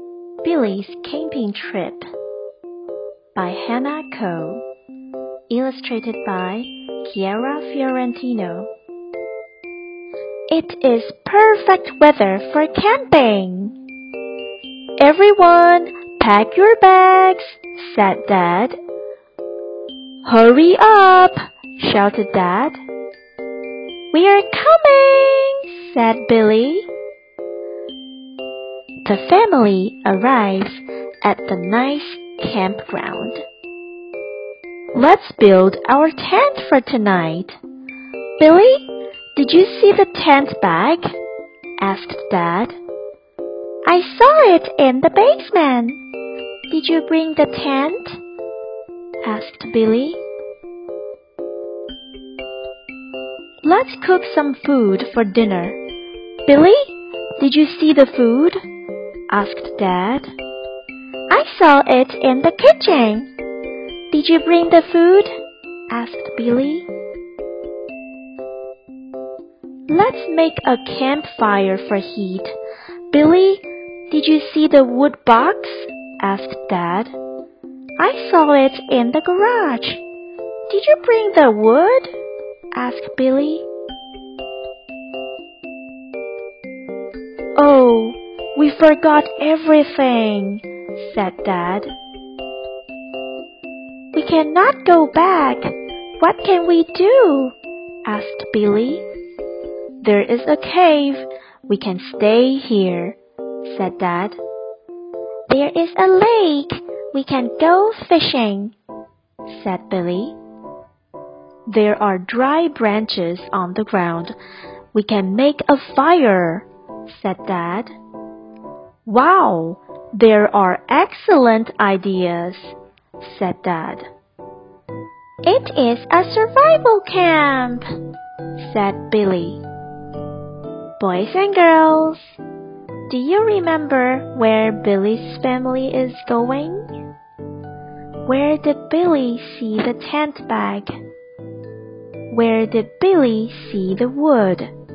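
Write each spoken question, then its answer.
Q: Boys and girls, do you remember where Billy's family is going?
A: Camping

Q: Where did Billy see the tent bag?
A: In the basement

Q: Where did Billy see the wood?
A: In the garage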